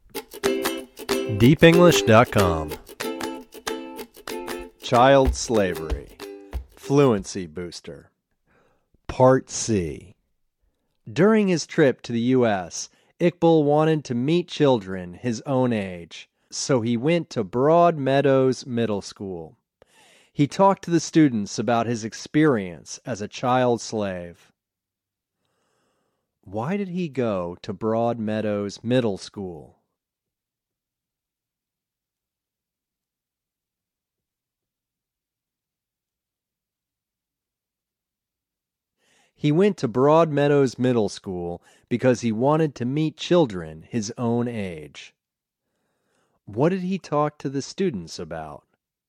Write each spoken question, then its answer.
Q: What did he talk to the students about?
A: He talked to the students about his experience as a child slave.